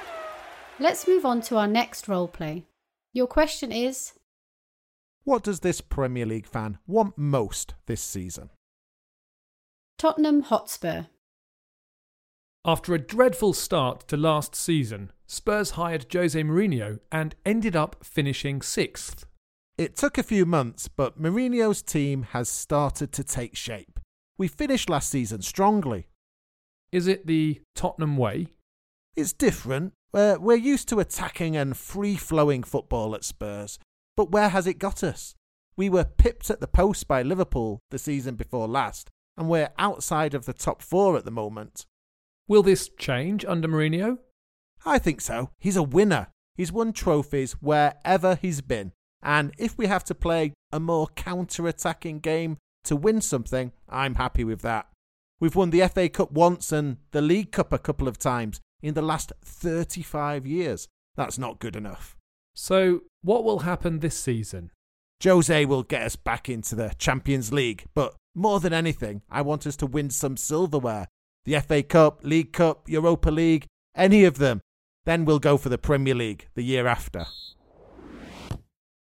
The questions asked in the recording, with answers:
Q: what does this Premier League fan want most this season?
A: He wants Tottenham to win something.